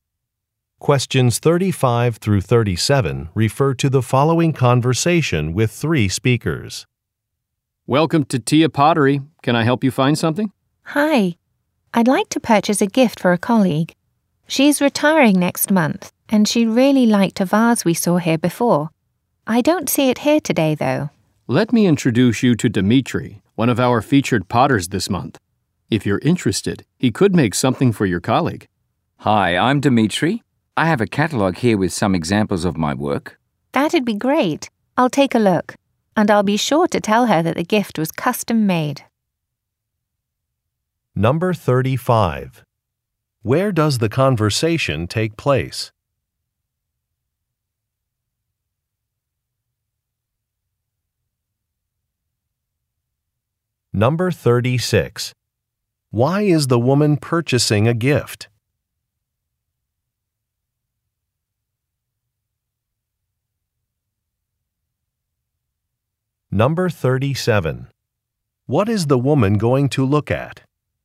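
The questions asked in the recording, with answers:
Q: Where does the conversation take place?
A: At a pottery shop

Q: Why is the woman purchasing a gift?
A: A colleague is retiring

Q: What is the woman going to look at?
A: A catalogue of the potter's work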